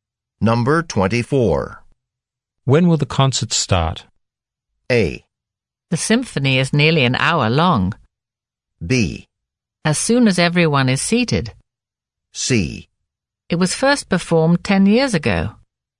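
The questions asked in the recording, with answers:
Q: When will the concert start?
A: B: As soon as everyone is seated.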